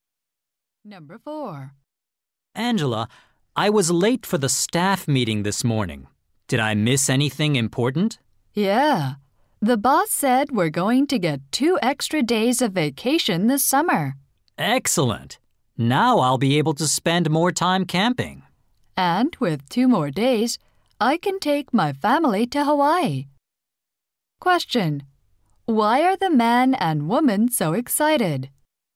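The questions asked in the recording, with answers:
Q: Why are the man and woman so excited?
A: They will get two extra vacation days.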